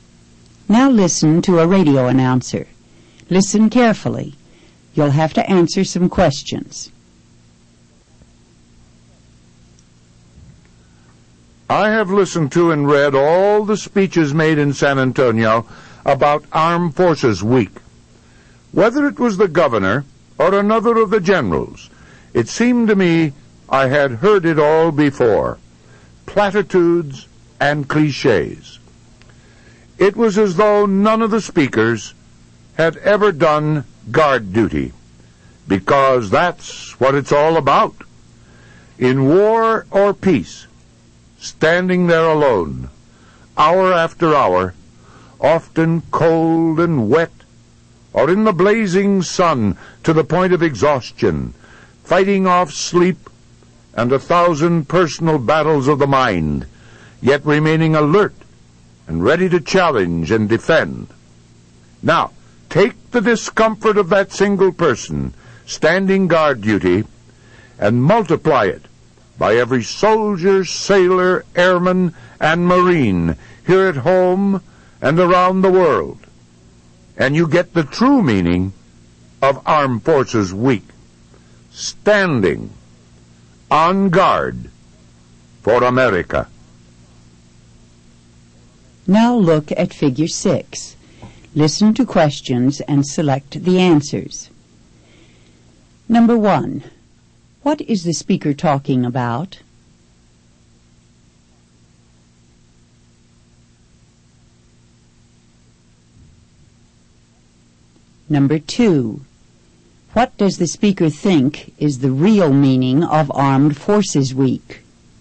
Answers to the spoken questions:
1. Number 1 is B. The speaker is talking about Armed Forces Week.
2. Number 2 is C. The speaker thinks the real meaning of Armed Forces Week is experiencing guard duty.